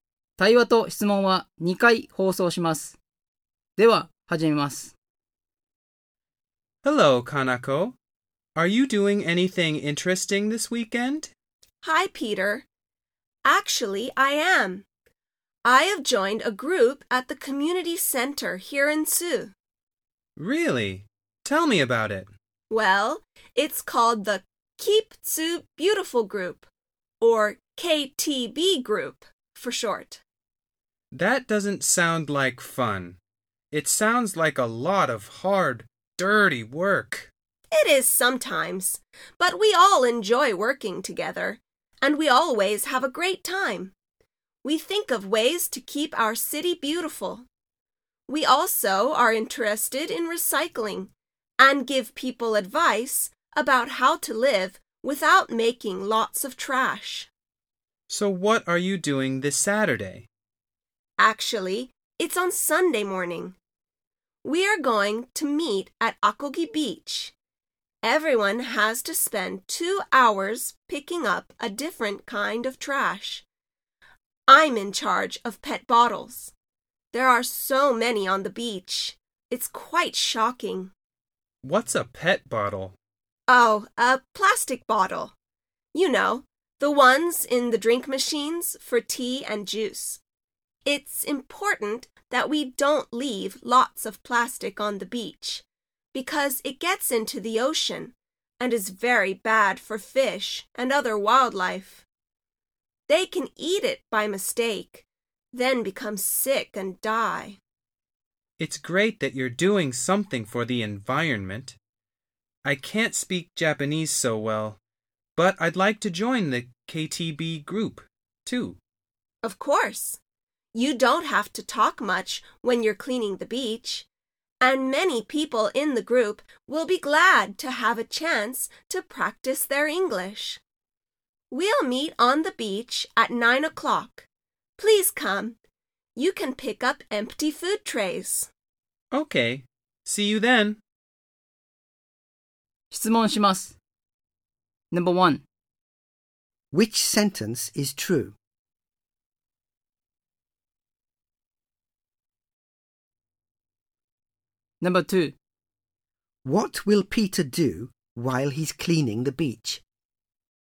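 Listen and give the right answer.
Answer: Pick up empty food trays.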